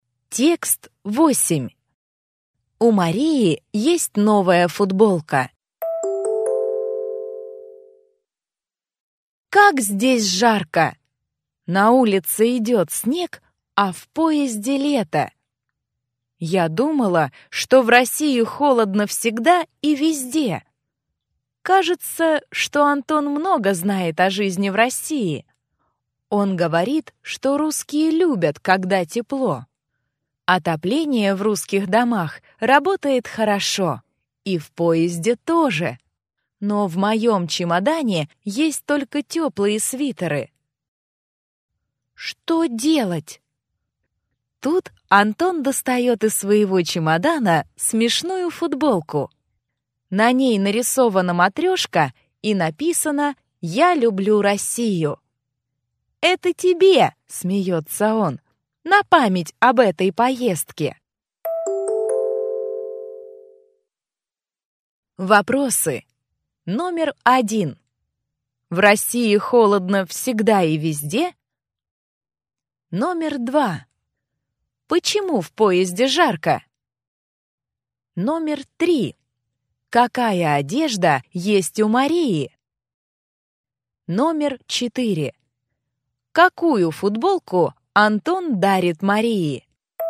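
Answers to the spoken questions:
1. Нет, в домах и в поезде тепло
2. Отопление хорошо работает
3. Только тёплые свитеры
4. Смешную футболку с матрёшкой и надписью «Я люблю Россию»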